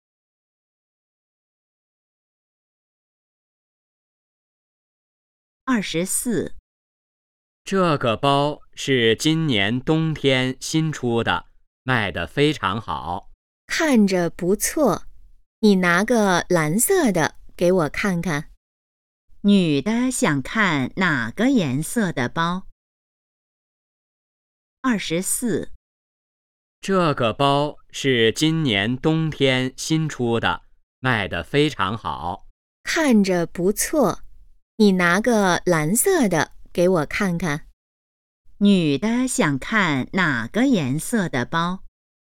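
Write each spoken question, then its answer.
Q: 女的想看哪个颜色的包?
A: 蓝色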